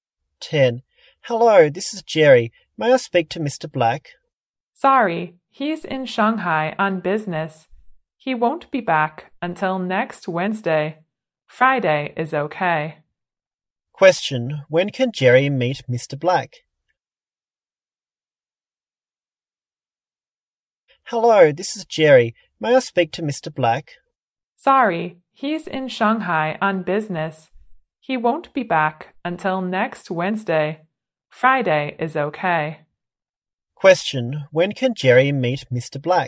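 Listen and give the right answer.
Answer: Next Friday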